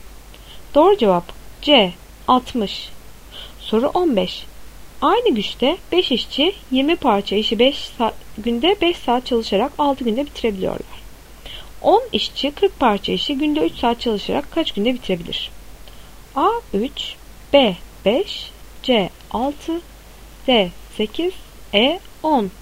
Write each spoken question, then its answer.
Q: 10 işçi 40 parça işi günde 3 saat çalışarak kaç günde bitirebilir?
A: Doğru cevap E 10.